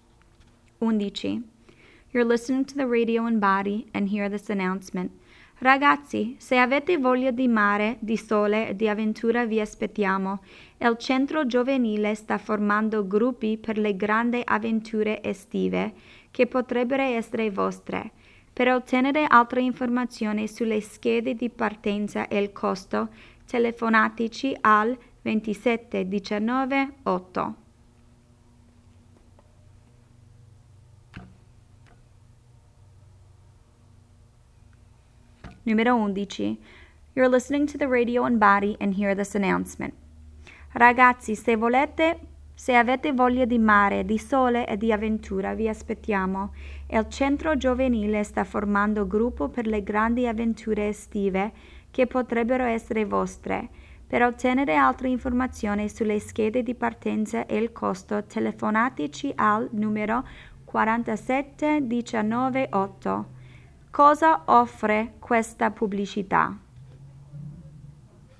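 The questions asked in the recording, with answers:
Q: Cosa offre questa pubblicità?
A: Avventure estive di gruppo al mare per ragazzi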